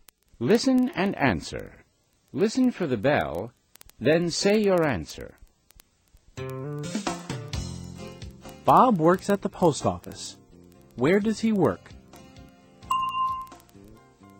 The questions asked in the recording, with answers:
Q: Where does he work?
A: He works at the post office.